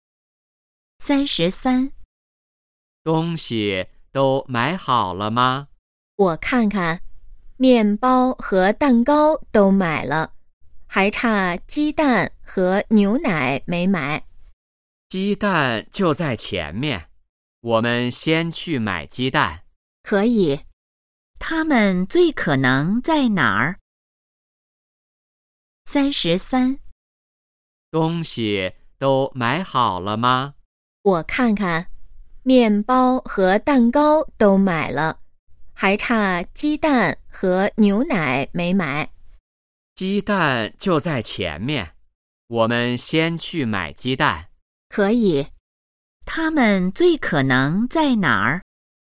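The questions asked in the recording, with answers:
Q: 他们最可能在哪儿?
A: 超市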